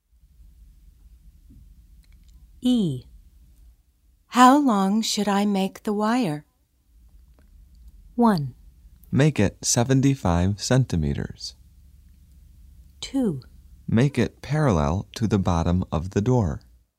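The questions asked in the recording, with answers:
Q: How long should I make the wire?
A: 1: Make it 75 centimeters.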